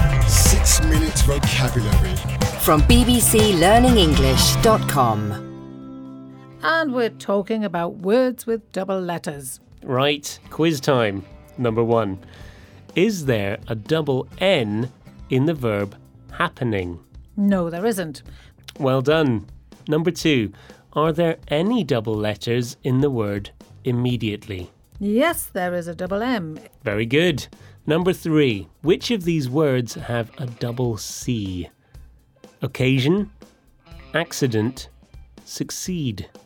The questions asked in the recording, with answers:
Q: Is there a double N in the verb happening?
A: No, there isn't.